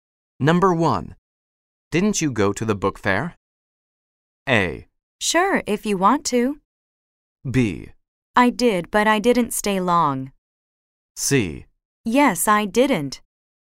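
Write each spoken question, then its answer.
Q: Didn't you go to the book fair?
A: B: I did, but I didn't stay long.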